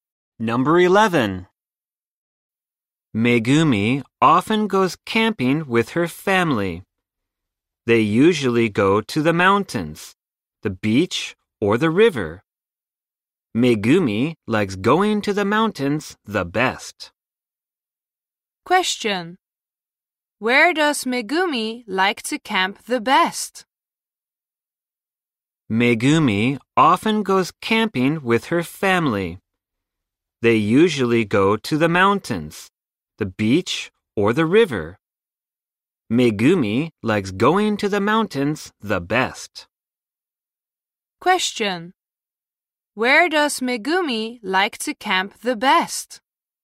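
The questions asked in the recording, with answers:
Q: Where does Megumi like to camp the best?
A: In the mountains.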